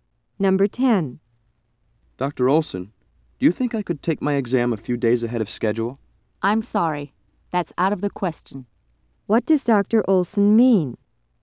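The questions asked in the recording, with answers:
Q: What does Dr. Olson mean?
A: The student cannot take the exam early.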